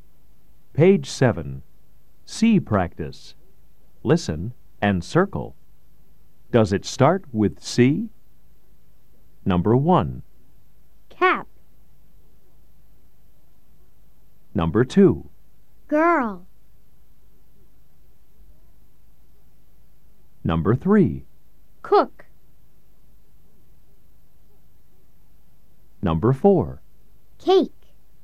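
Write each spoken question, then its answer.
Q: Does it start with C? Number 1.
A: Yes (cap)

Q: Number 2.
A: No (girl)

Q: Number 3.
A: Yes (cook)

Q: Number 4.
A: Yes (cake)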